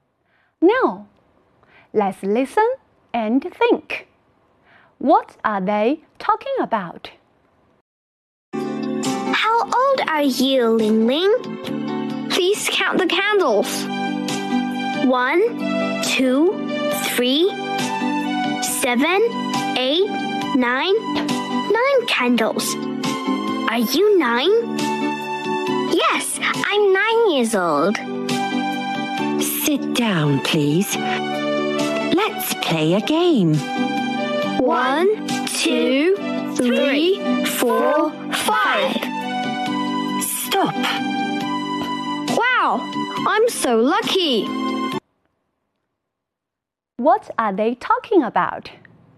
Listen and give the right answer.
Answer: They are talking about the numbers at party.